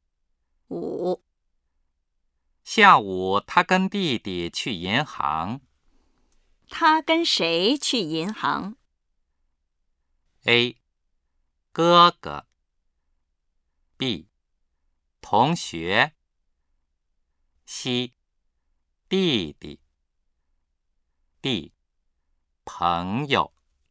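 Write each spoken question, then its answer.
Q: 他跟谁去银行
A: C: 弟弟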